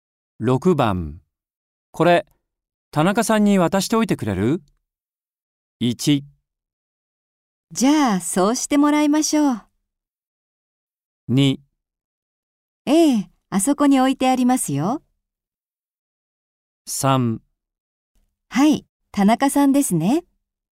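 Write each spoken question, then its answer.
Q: これ、田中さんに渡しておいてくれる?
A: 3: はい、田中さんですね。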